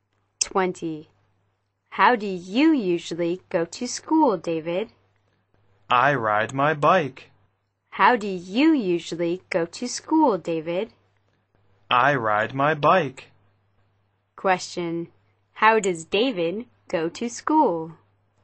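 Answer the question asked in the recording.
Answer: By bike.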